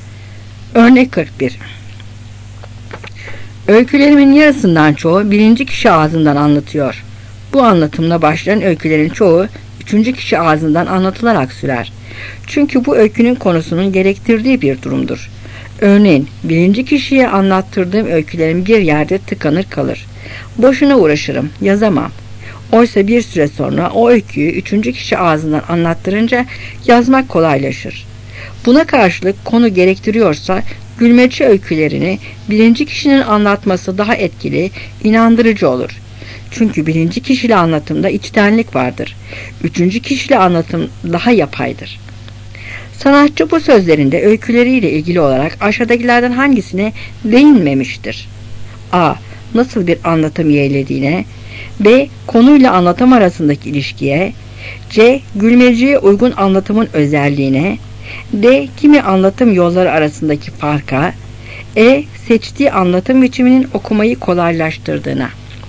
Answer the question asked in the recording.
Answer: Cevap E.